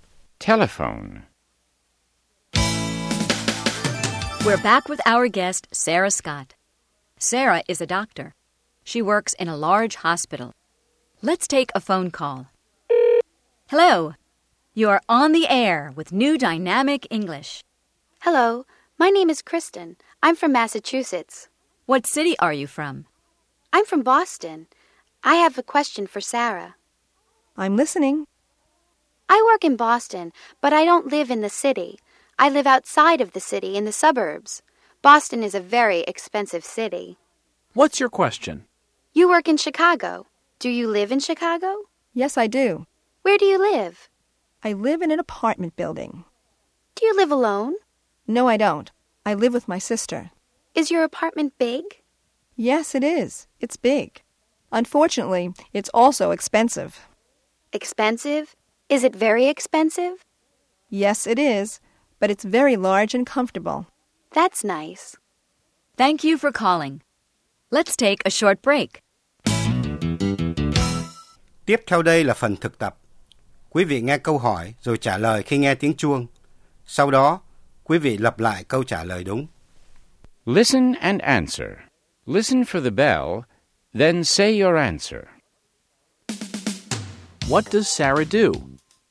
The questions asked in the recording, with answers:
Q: What does Sarah do?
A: She's a doctor.